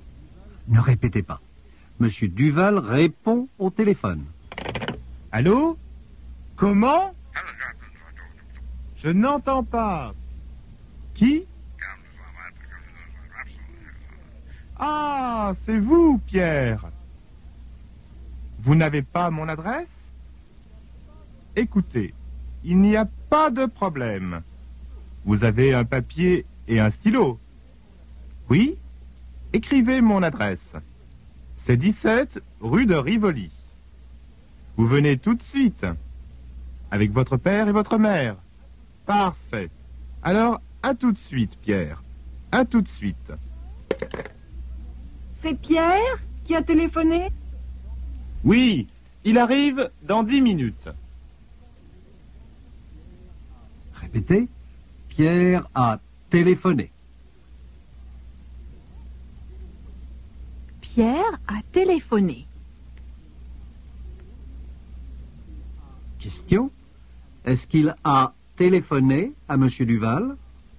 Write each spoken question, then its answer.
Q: Est-ce qu'il a téléphoné à M.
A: Oui, il a téléphoné à M. Duval.